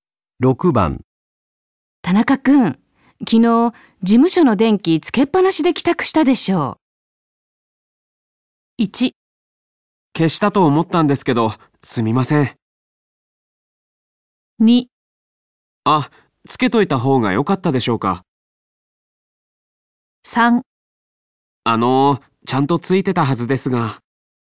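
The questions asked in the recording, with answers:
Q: 田中くん、昨日事務所の電気つけっぱなしで帰宅したでしょう。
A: 1: 消したと思ったんですけど、すみません。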